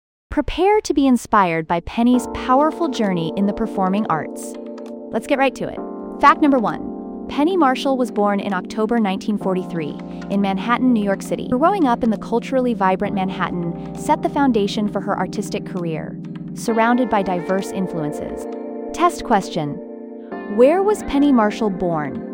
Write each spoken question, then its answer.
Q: Where was Penny Marshall born?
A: Correct answer, Manhattan, New York City.